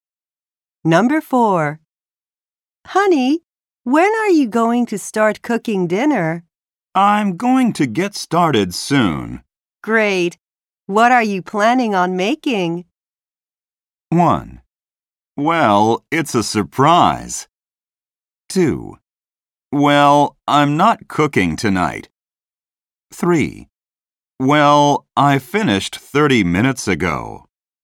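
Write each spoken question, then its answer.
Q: Great. What are you planning on making?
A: 1: Well, it's a surprise.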